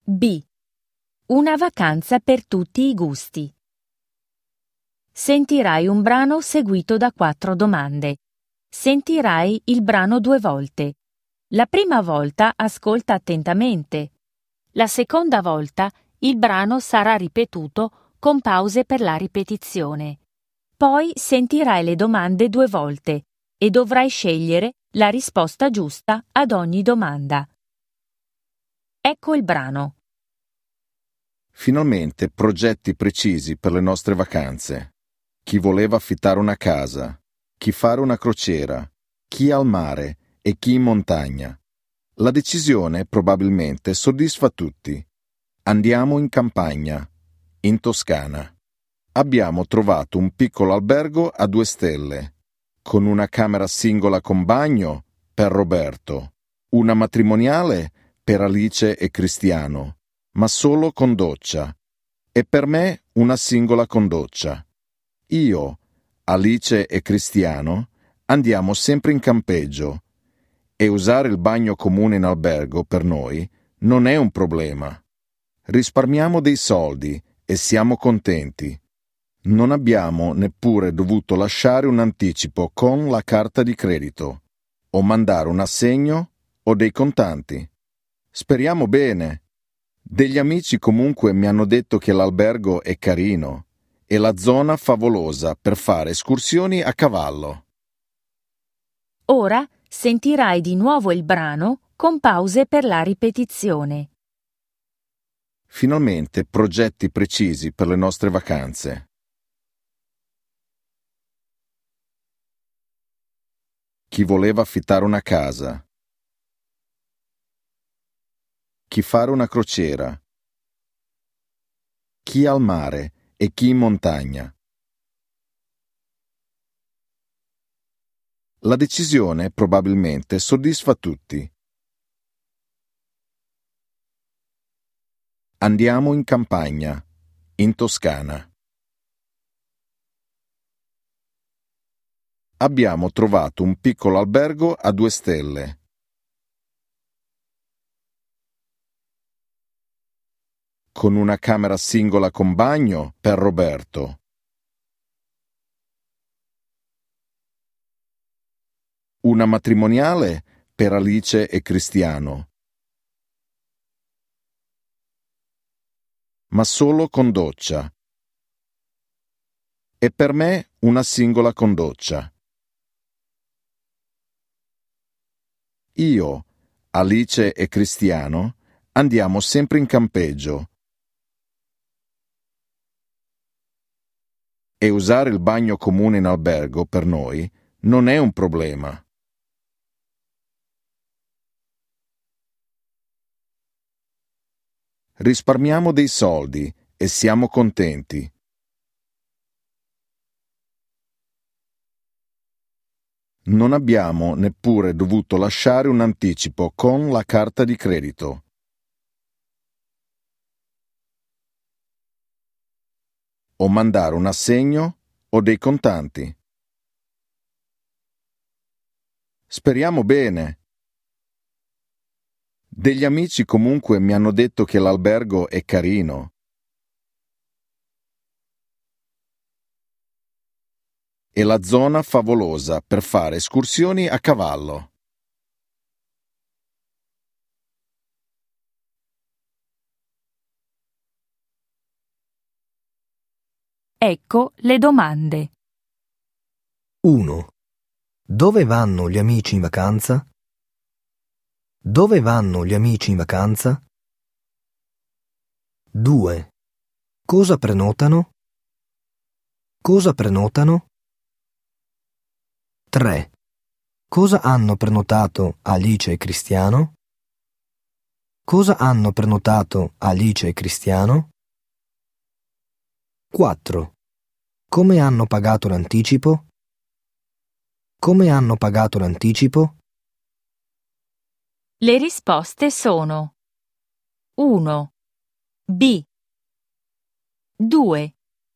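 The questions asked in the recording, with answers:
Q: Dove vanno gli amici in vacanza?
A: In campagna, in Toscana

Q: Cosa prenotano?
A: Camere in un piccolo albergo a 2 stelle

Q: Cosa hanno prenotato Alice e Cristiano?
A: Una camera matrimoniale con doccia

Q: Come hanno pagato l'anticipo?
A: Non hanno pagato nessun anticipo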